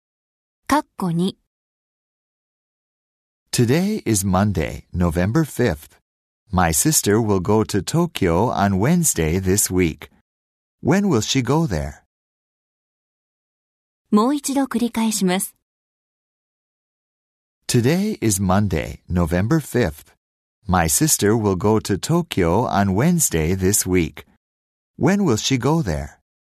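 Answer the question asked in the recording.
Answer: On Wednesday, November 7th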